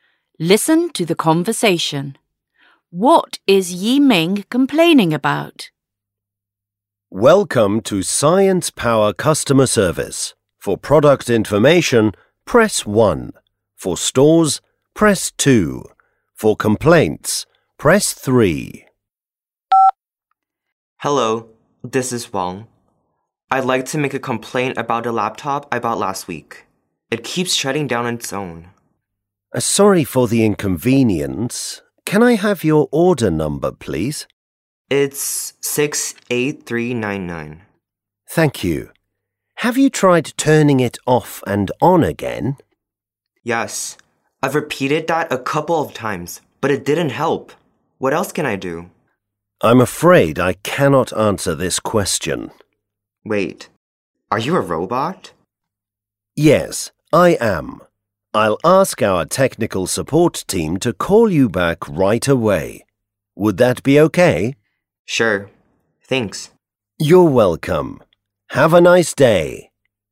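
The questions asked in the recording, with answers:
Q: What is Yiming complaining about?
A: A laptop he bought last week keeps shutting down on its own.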